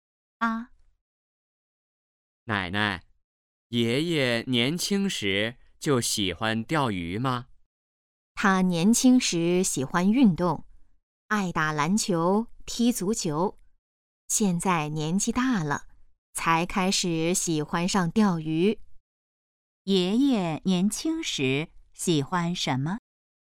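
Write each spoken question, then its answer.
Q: 爷爷年轻时喜欢什么?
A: 运动(打篮球、踢足球)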